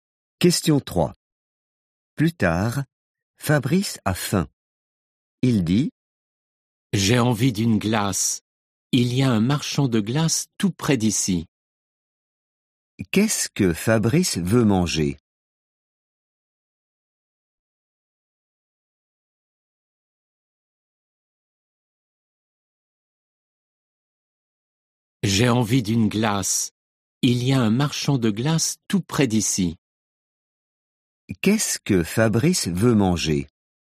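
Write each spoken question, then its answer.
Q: Qu'est-ce que Fabrice veut manger?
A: une glace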